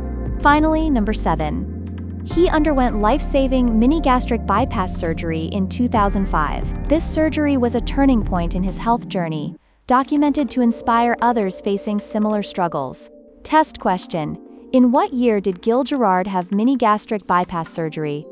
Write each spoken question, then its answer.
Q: in what year did Gil Gerard have mini gastric bypass surgery?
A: 2005.